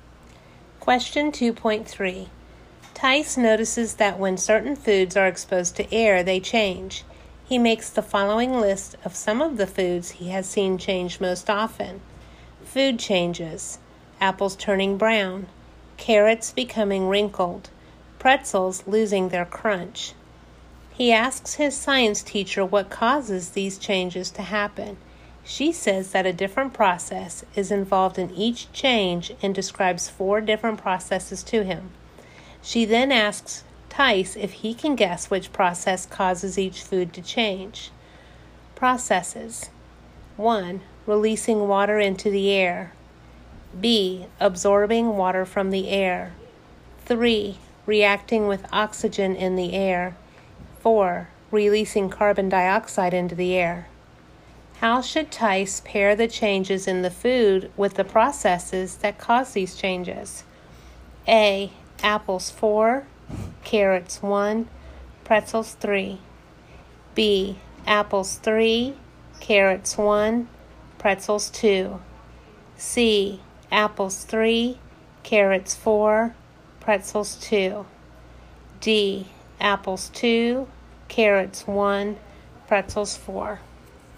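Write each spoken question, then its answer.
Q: How should Tice pair the changes in the food with the processes that cause these changes?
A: B: apples 3, carrots 1, pretzels 2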